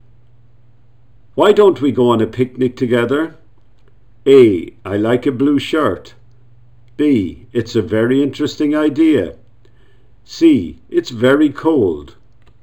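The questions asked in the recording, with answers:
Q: Why don't we go on a picnic together?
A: B: It's a very interesting idea.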